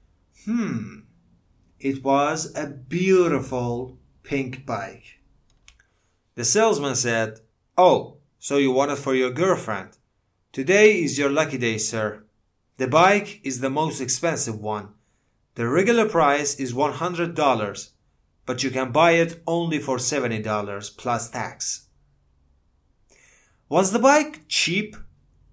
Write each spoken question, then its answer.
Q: Was the bike cheap?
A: No. It wasn't cheap. It was really expensive.